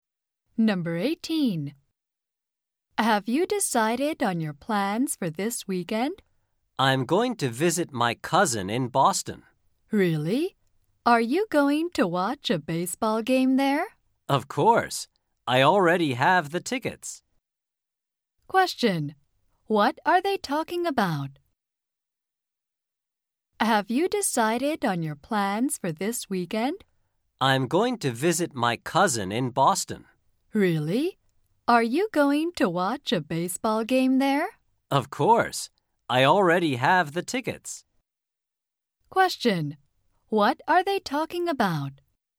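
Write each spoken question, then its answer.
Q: What are they talking about?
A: Plans for this weekend (visiting a cousin in Boston and watching a baseball game)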